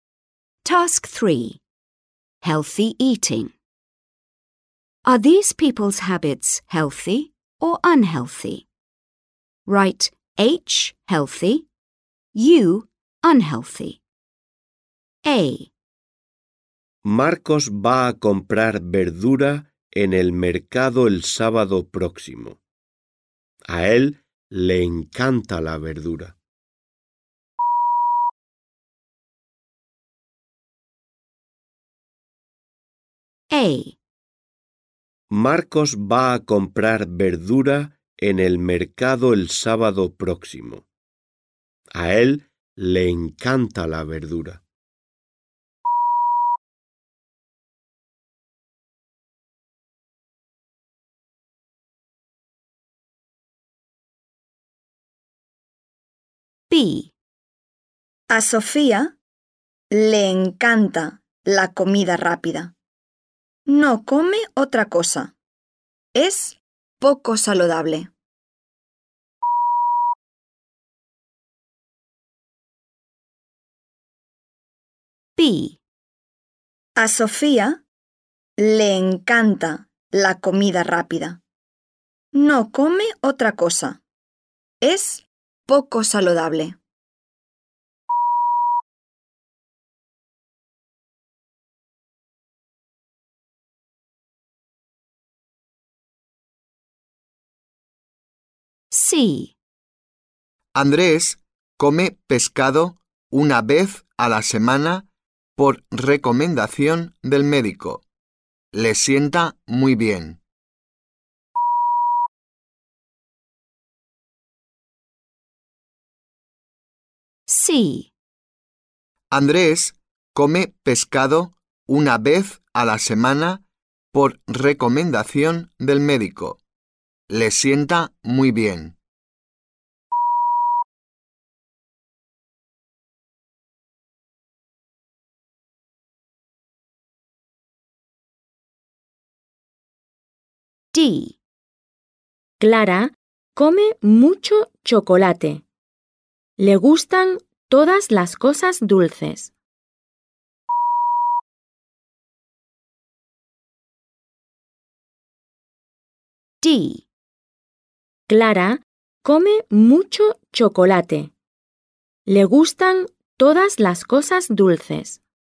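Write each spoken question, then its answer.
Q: Are these people's habits healthy or unhealthy?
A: H: healthy

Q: Are these people's habits healthy or unhealthy?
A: U: unhealthy

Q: Are these people's habits healthy or unhealthy?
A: H: healthy

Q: Are these people's habits healthy or unhealthy?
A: U: unhealthy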